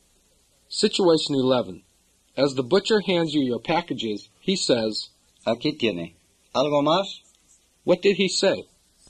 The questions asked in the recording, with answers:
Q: What did he say?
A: He said, "Here you are. Anything else?"